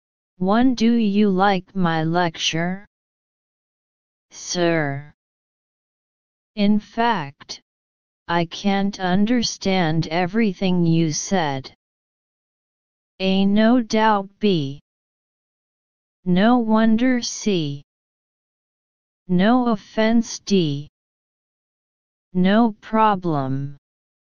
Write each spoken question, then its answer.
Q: Do you like my lecture? Sir. In fact, I can't understand everything you said.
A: Answer C.